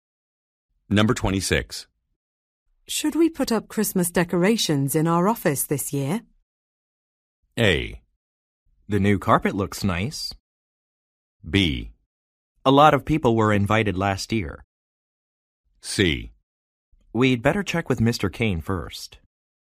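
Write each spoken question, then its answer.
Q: Should we put up Christmas decorations in our office this year?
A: C: We'd better check with Mr. Kane first.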